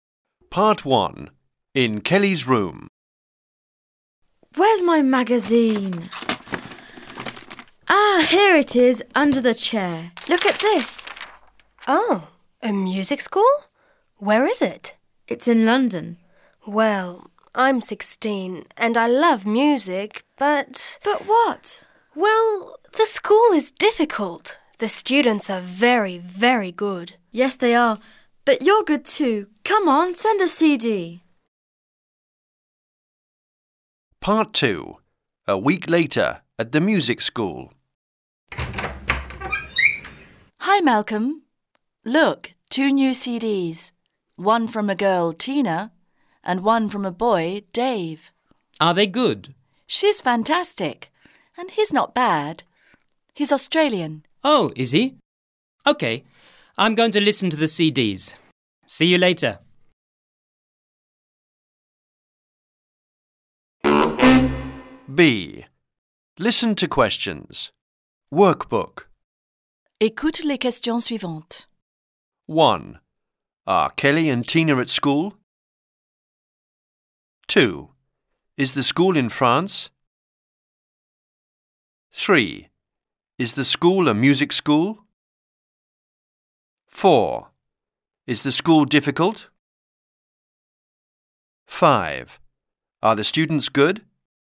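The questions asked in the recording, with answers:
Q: Is the school in France?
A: No, it's in London.

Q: Is the school a music school?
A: Yes, it is.

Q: Is the school difficult?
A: Yes, it is.

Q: Are the students good?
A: Yes, they are very good.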